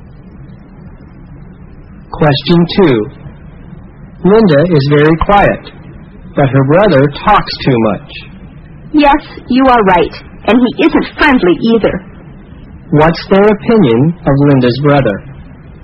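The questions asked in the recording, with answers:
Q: What's their opinion of Linda's brother?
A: He talks too much and isn't friendly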